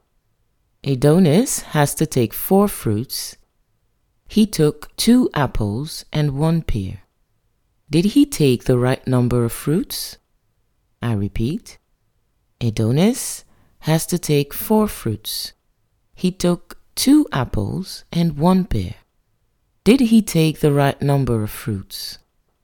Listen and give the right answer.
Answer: then he didn't take the right number of fruits. He only took 3 fruits.